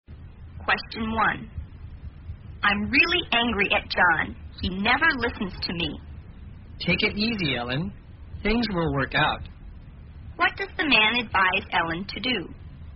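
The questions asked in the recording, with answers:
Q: What does the man advise Ellen to do?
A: To calm down (take it easy)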